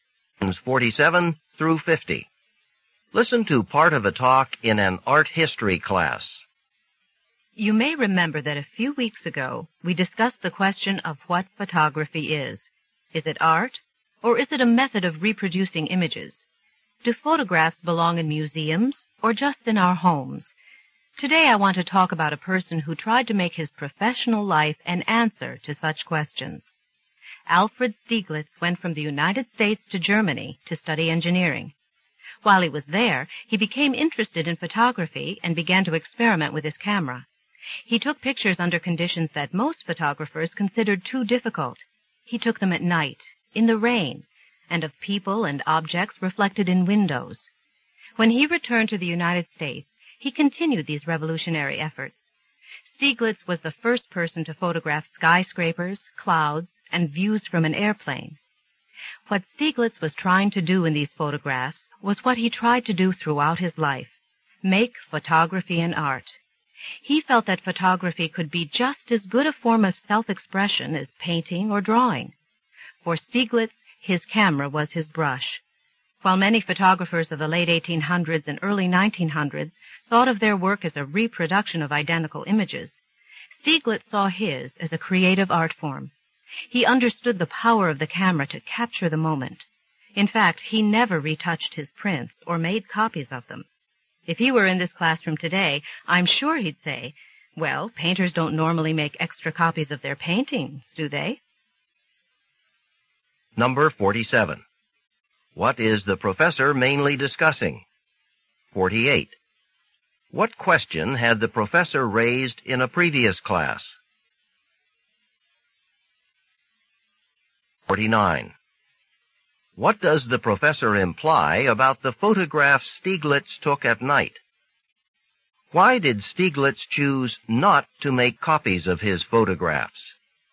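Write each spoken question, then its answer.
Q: What is the professor mainly discussing?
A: Alfred Stieglitz's efforts to make photography an art

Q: What question had the professor raised in a previous class?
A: Whether photography is art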